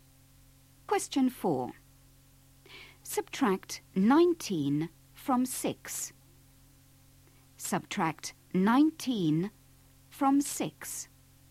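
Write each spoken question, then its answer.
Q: Subtract 19 from 6.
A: -13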